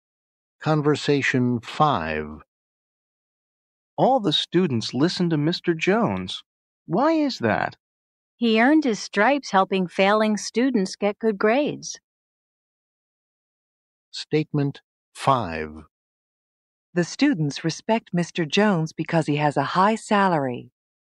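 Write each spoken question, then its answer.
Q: The students respect Mr. Jones because he has a high salary.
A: False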